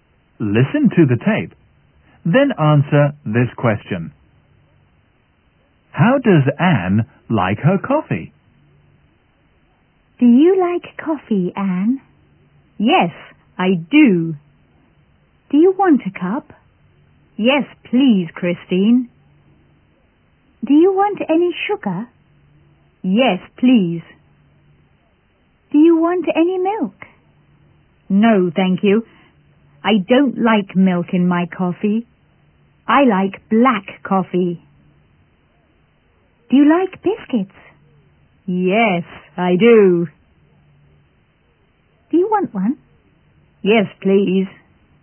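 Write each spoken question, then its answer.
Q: How does Anne like her coffee?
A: Black, with sugar and no milk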